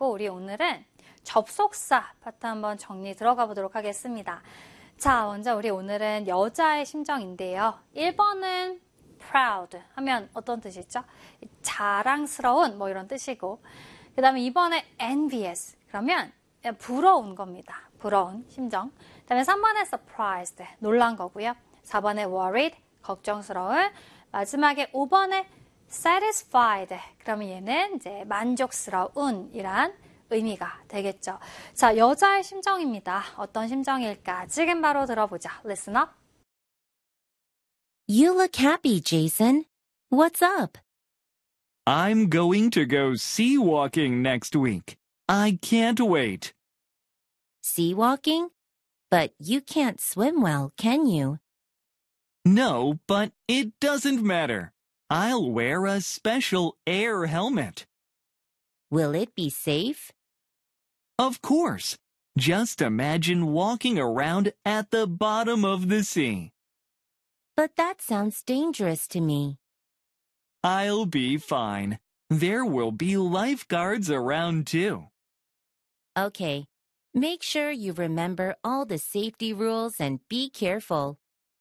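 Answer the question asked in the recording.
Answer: 4: worried, 걱정스러운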